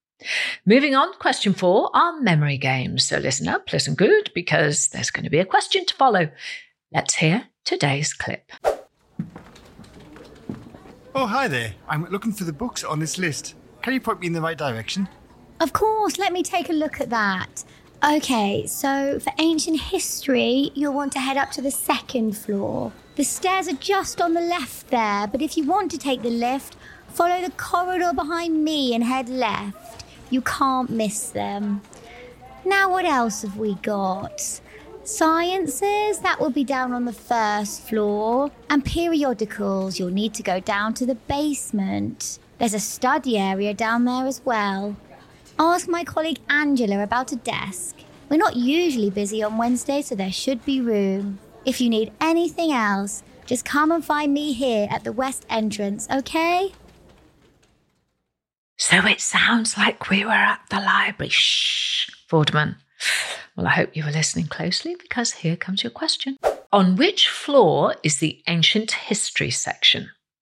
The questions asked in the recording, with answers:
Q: On which floor is the ancient history section?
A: And the answer is, it's on the second floor.